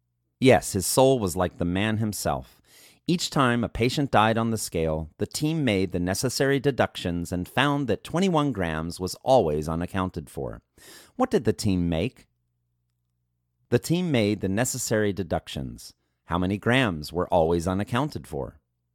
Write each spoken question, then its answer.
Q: How many grams were always unaccounted for?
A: 21 grams were always unaccounted for.